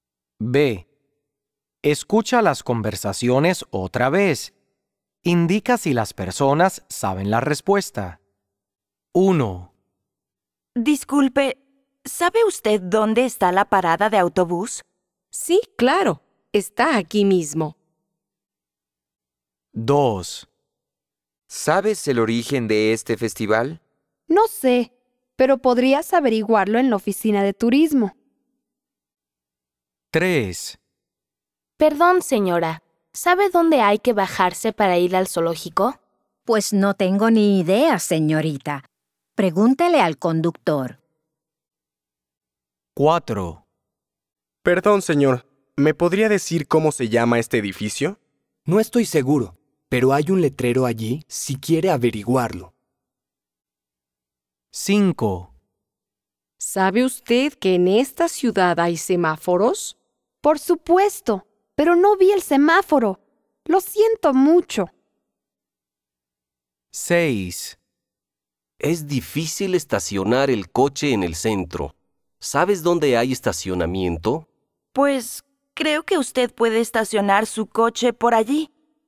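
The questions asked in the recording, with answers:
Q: Indica si las personas saben la respuesta.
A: Sí, sabe la respuesta

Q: Indica si las personas saben la respuesta.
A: No, no sabe la respuesta

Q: Indica si las personas saben la respuesta.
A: No, no sabe la respuesta

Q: Indica si las personas saben la respuesta.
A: No, no sabe la respuesta

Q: Indica si las personas saben la respuesta.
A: Sí, sabe la respuesta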